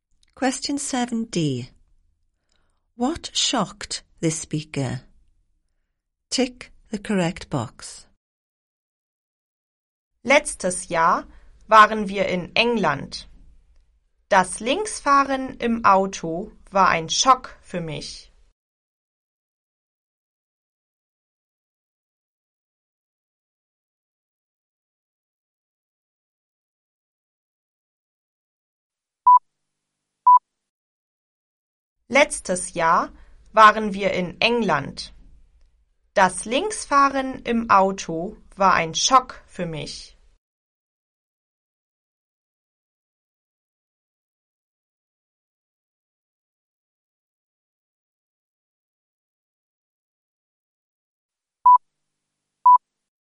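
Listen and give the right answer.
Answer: Driving on the left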